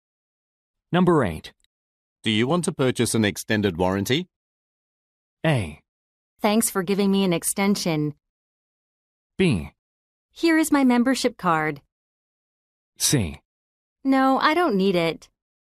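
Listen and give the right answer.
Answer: C: No, I don't need it.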